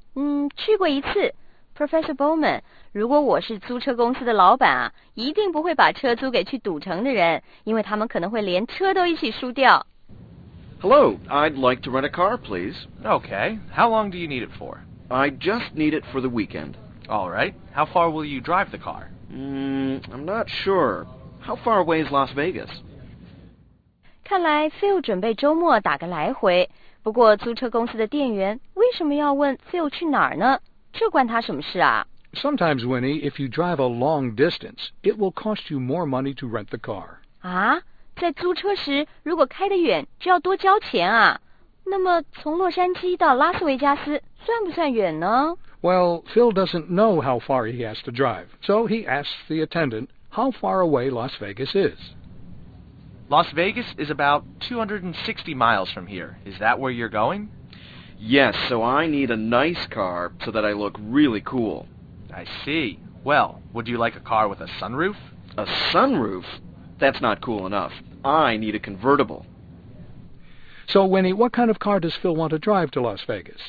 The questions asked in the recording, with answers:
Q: So, Winnie, what kind of car does Phil want to drive to Las Vegas?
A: 他想开一辆酷酷的车,去拉斯维加斯这种花花世界啊,当然得开辆好车咯。